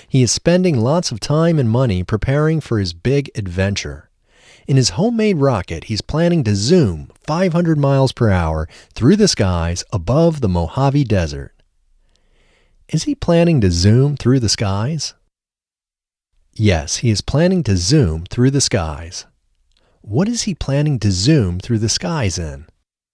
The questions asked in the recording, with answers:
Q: What is he planning to zoom through the skies in?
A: He is planning to zoom through the skies in his homemade rocket.